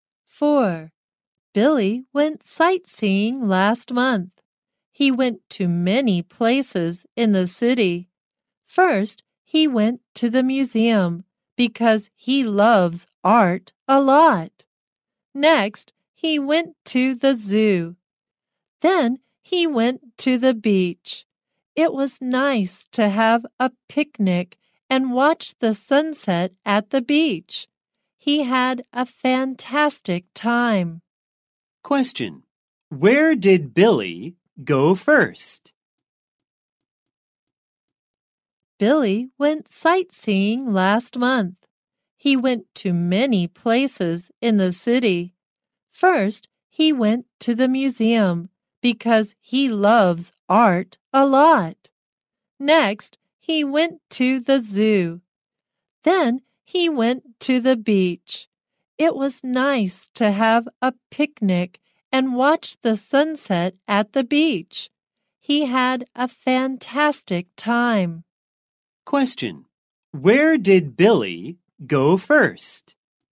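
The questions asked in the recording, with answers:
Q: Question: Where did Billy go first?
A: The museum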